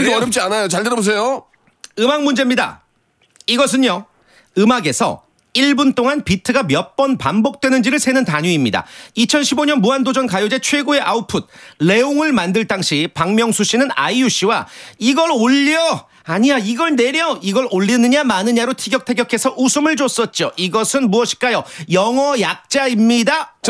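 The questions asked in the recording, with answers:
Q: 이것은 무엇일까요? 영어 약자입니다.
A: BPM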